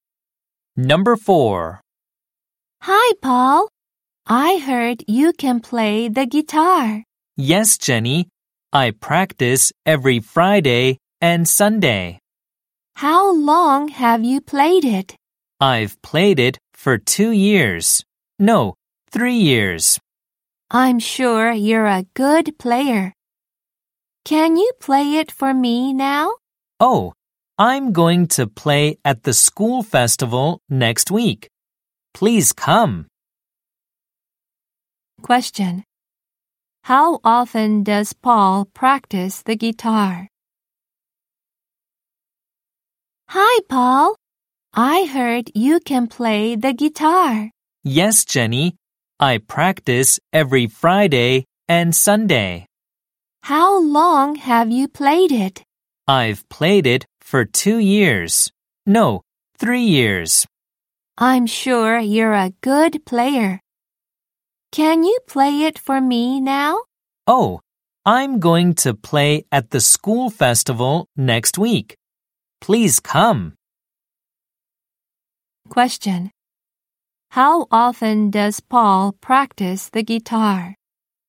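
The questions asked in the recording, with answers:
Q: How often does Paul practice the guitar?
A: Twice a week (every Friday and Sunday)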